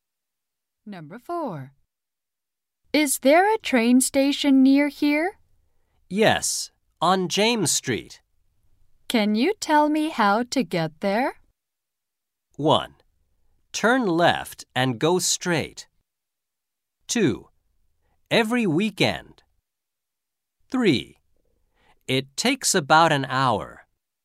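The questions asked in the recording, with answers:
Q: Can you tell me how to get there?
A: 1: Turn left and go straight.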